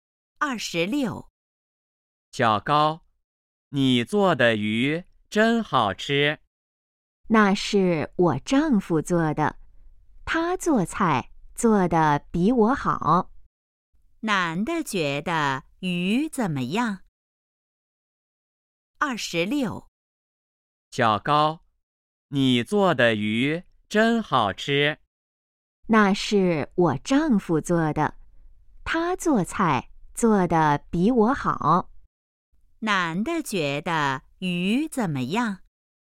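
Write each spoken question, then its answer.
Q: 男的觉得鱼怎么样?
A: 很好吃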